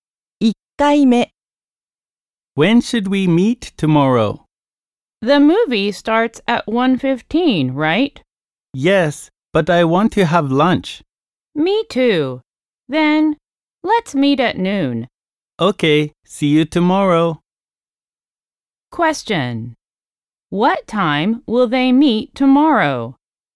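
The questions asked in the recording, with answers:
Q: What time will they meet tomorrow?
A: At noon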